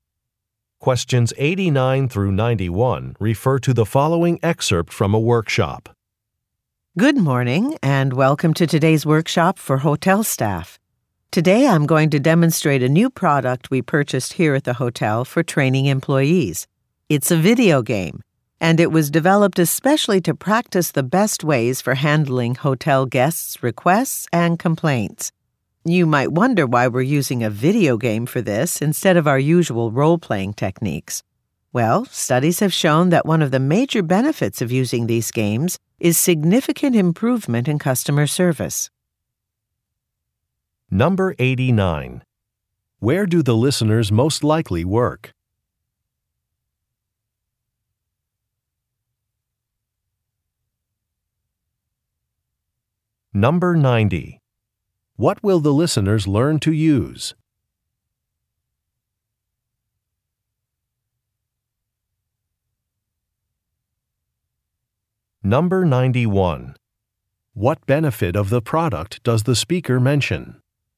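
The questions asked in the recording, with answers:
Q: Where do the listeners most likely work?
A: At a hotel

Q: What will the listeners learn to use?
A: A video game for training

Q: What benefit of the product does the speaker mention?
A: Significant improvement in customer service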